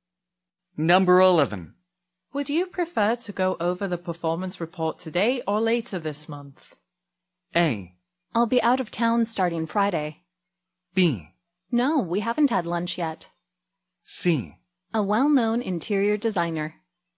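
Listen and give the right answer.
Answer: A: I'll be out of town starting Friday.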